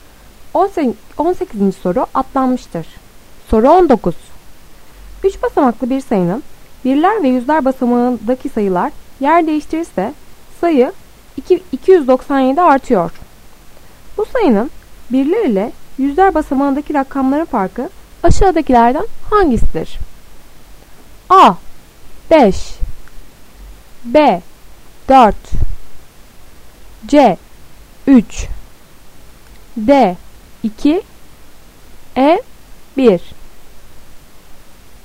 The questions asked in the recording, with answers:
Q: Bu sayının birler ile yüzler basamağındaki rakamların farkı aşağıdakilerden hangisidir?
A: Doğru cevap C. 3